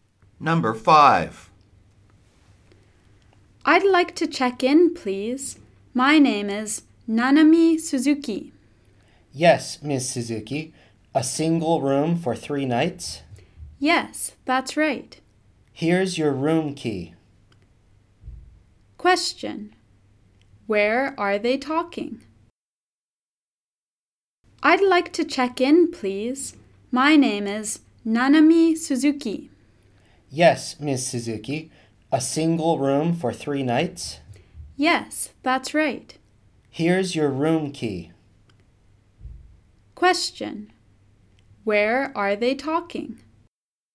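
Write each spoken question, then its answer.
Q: Where are they talking?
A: At a hotel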